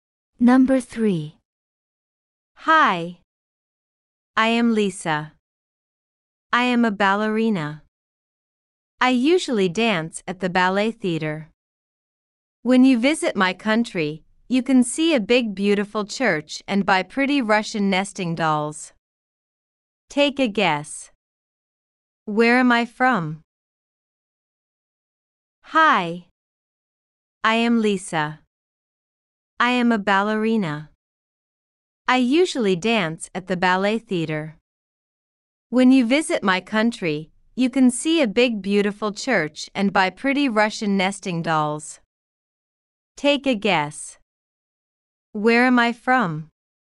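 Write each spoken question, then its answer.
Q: Take a guess.Where am I from?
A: Russia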